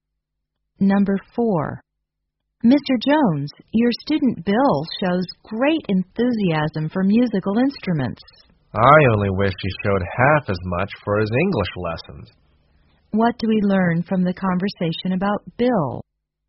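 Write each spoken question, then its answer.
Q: What do we learn from the conversation about Bill?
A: He is more interested in music than in his English lessons.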